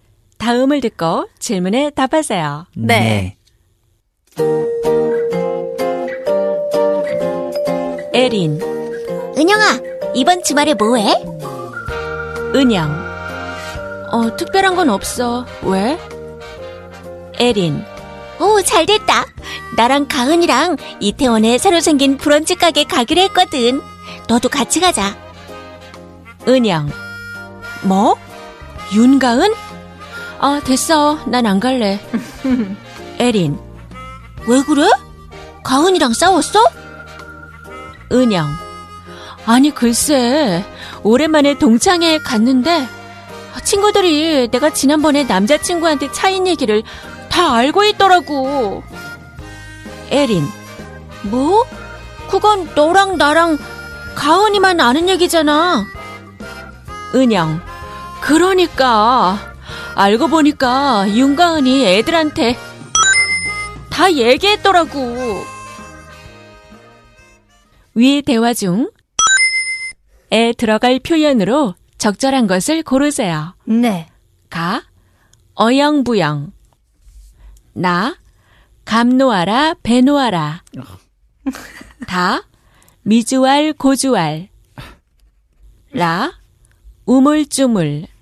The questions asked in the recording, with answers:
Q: 위 대화 중에 들어갈 표현으로 적절한 것을 고르세요.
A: To the last detail! 윤가은이 미주알, 고주알 다 이야기했더라고.